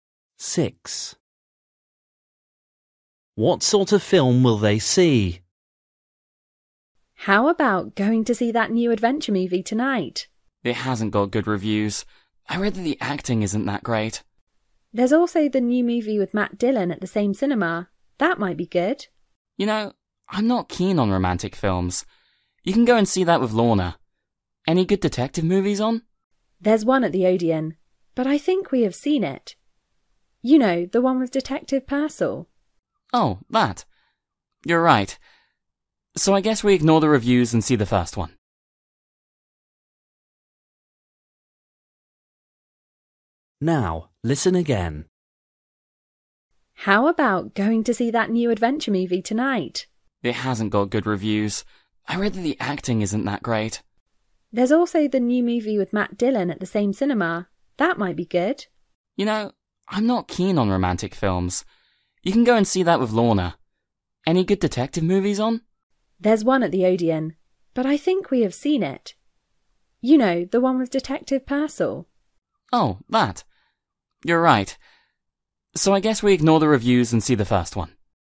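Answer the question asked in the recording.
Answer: an adventure film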